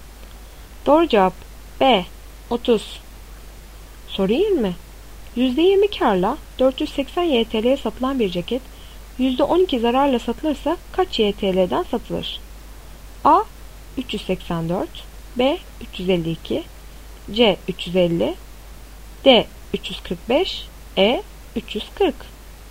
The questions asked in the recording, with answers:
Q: %20 karla 480 YTL'ye satılan bir ceket %12 zararla satılırsa kaç YTL'den satılır?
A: Doğru cevap B 352.